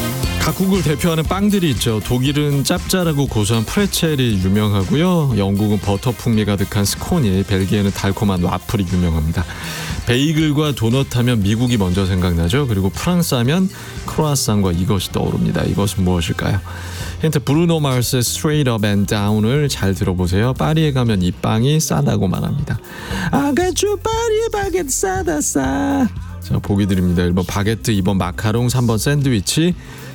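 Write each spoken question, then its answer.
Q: 이것은 무엇일까요?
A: 1번: 바게트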